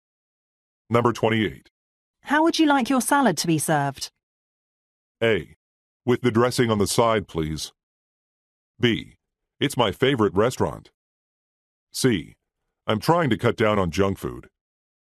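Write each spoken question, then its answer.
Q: How would you like your salad to be served?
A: A: With the dressing on the side, please.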